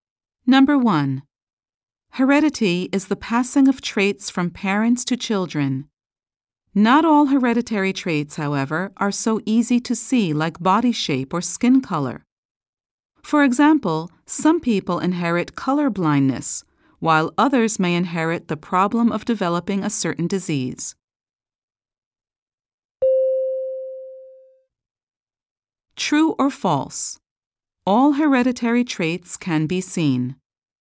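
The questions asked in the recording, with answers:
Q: True or false? All hereditary traits can be seen.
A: False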